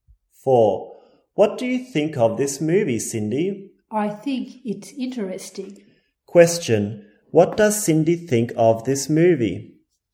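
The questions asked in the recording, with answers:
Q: What does Cindy think of this movie?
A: Interesting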